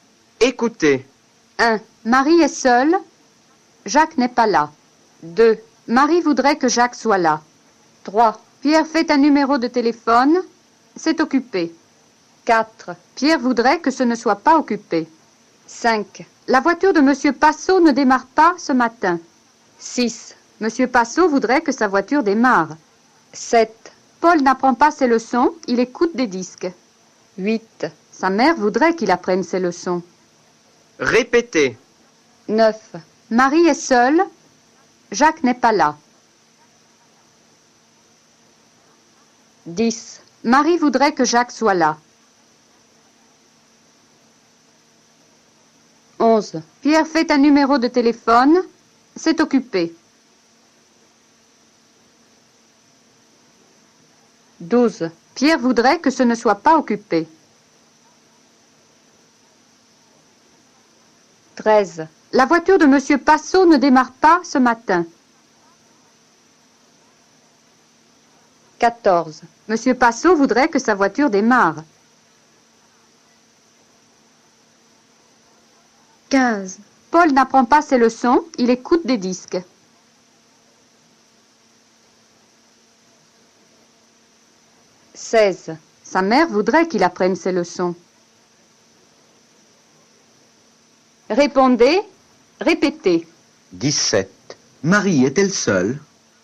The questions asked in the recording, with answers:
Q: Marie est-elle seule?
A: Oui, Marie est seule. Jacques n'est pas là.